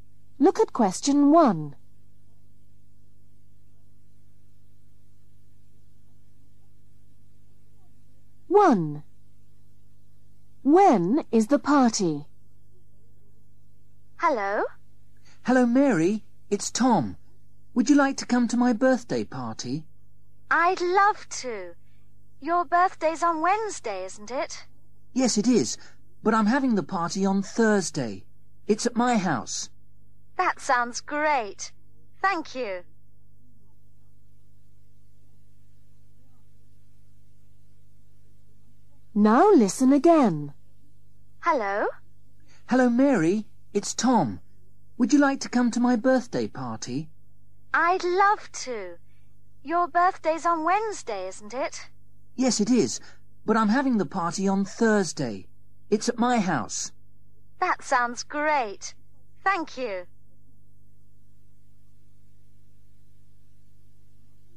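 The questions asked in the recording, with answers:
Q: When is the party?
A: Thursday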